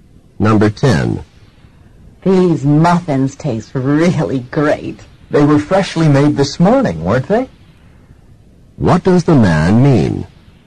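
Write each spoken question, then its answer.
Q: What does the man mean?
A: The muffins were freshly made this morning.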